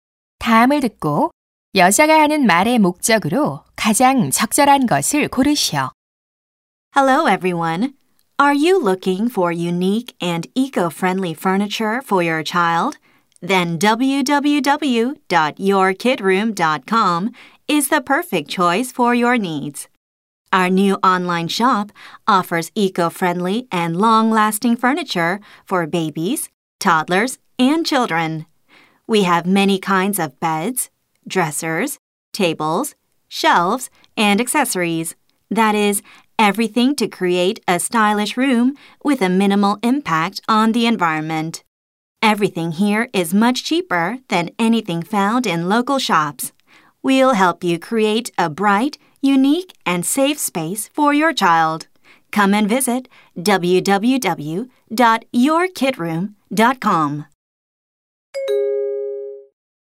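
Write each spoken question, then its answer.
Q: 다음을 듣고 여자가 하는 말의 목적으로 가장 적절한 것을 고르시오.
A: 친환경 아동 가구 온라인 쇼핑몰을 홍보하려고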